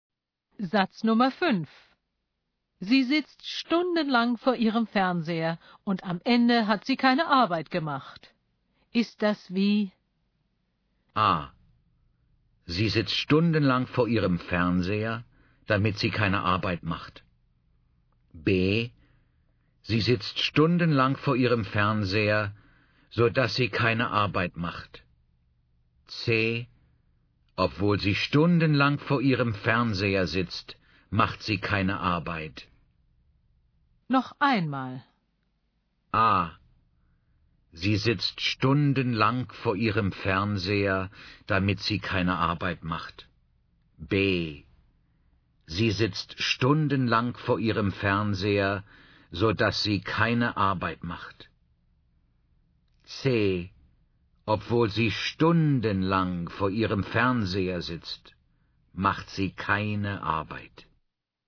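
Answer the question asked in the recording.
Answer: B: Sie sitzt stundenlang vor ihrem Fernseher, so dass sie keine Arbeit macht.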